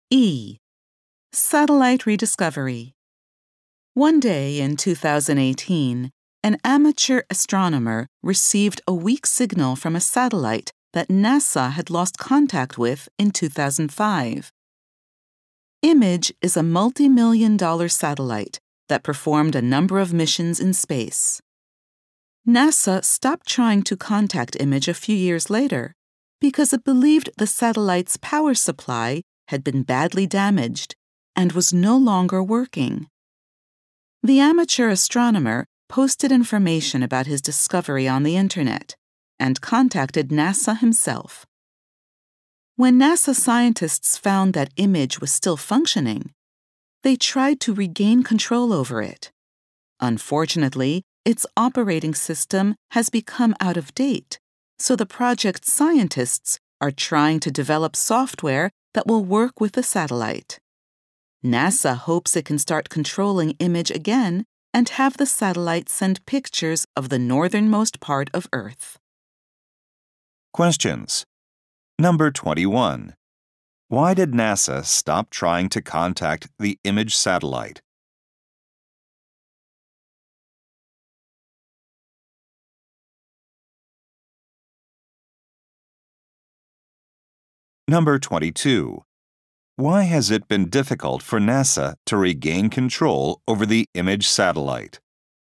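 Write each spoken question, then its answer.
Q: Why did NASA stop trying to contact the Image satellite?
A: It believed the satellite's power supply was badly damaged and no longer working.

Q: Why has it been difficult for NASA to regain control over the Image satellite?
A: Its operating system has become out of date, so new software is needed.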